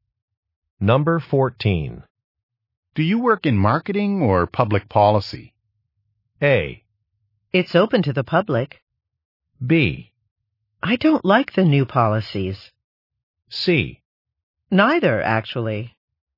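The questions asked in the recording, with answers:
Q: Do you work in marketing or public policy?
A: C: Neither, actually.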